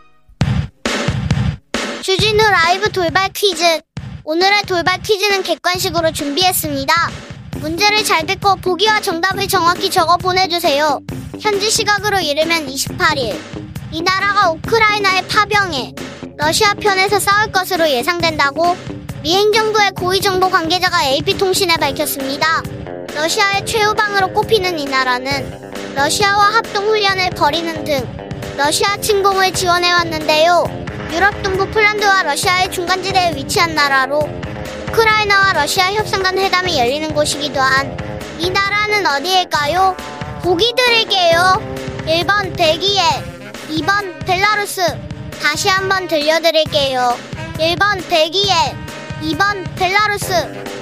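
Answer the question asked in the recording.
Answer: 2: 벨라루스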